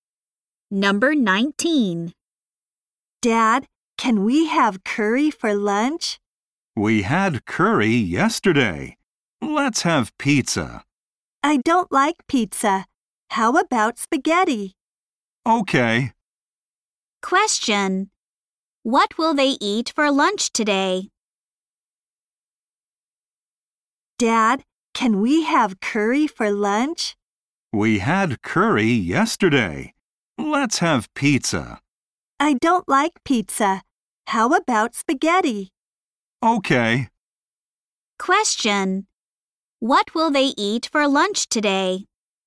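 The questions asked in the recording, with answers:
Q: What will they eat for lunch today?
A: Spaghetti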